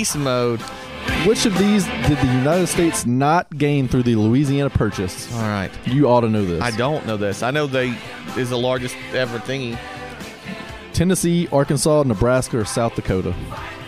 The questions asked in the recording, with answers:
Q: Which of these did the United States not gain through the Louisiana Purchase?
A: Oh, Tennessee.